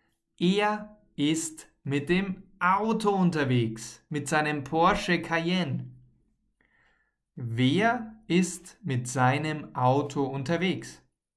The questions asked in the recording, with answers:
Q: Wer ist mit seinem Auto unterwegs?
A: Andreas, er ist mit seinem Auto unterwegs.